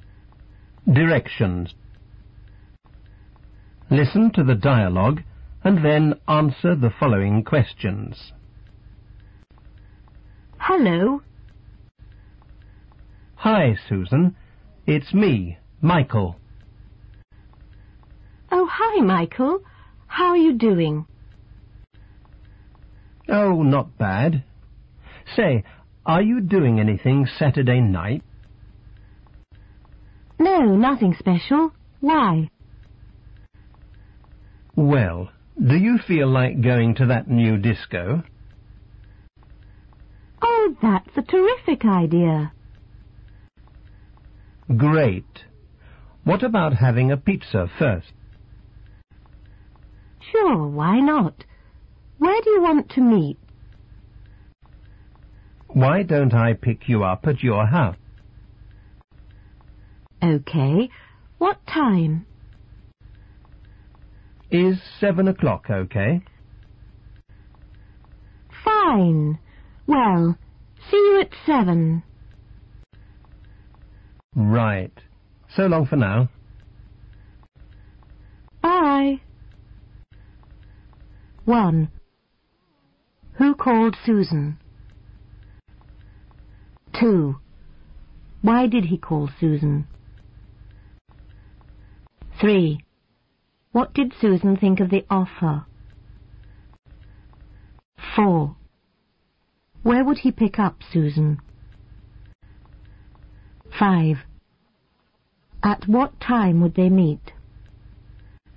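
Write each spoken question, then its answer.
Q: Who called Susan?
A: Michael

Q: Why did he call Susan?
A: To ask her to go to the new disco on Saturday night

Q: What did Susan think of the offer?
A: She thought it was a terrific idea

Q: Where would he pick up Susan?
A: At her house

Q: At what time would they meet?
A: At 7 o'clock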